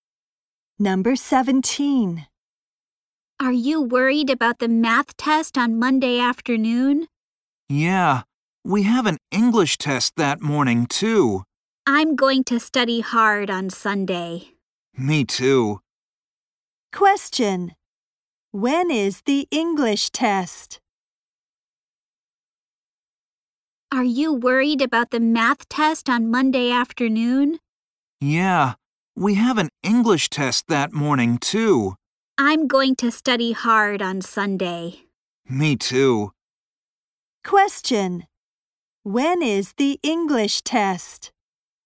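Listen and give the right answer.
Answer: Monday morning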